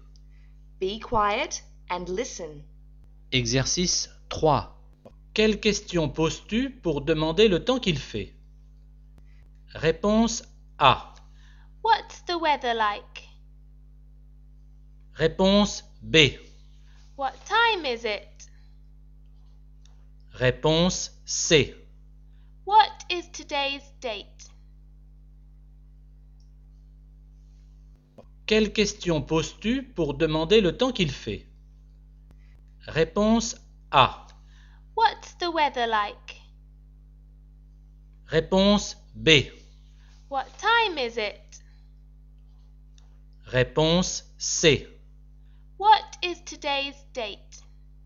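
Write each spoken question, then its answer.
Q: Quelle question poses-tu pour demander le temps qu'il fait?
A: A: What's the weather like?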